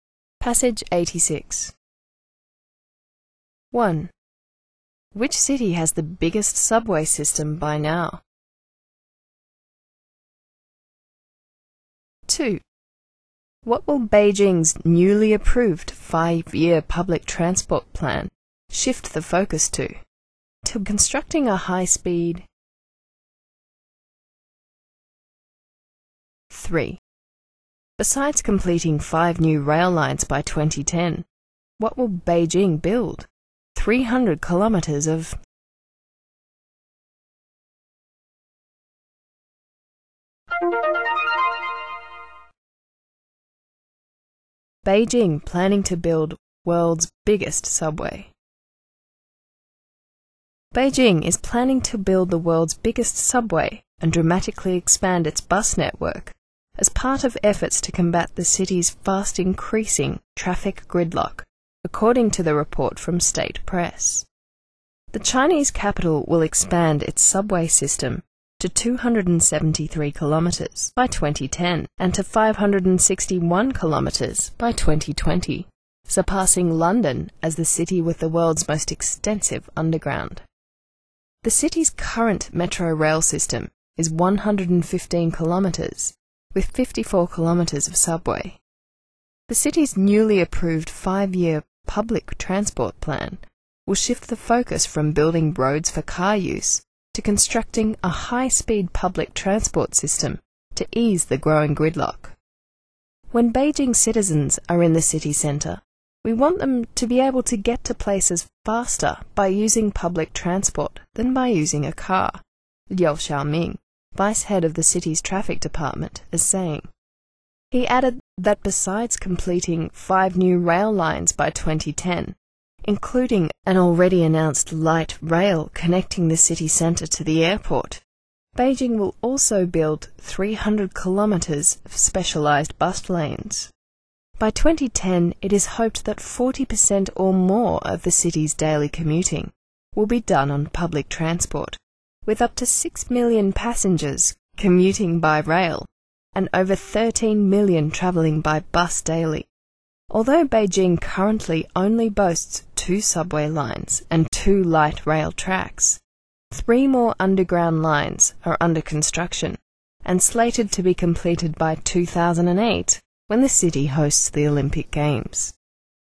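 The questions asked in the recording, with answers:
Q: Which city has the biggest subway system by now?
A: London

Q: What will Beijing's newly approved 5-year public transport plan shift the focus to?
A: To constructing a high-speed public transport system

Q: Besides completing 5 new rail lines by 2010, what will Beijing build?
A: 300 kilometers of specialised bus lanes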